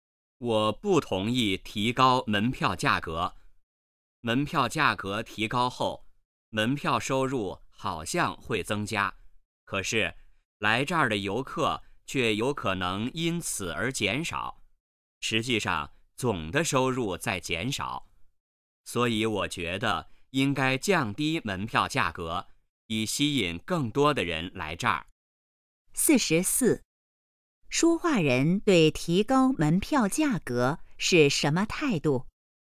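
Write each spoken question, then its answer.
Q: 说话人对提高门票价格是什么态度?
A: 不同意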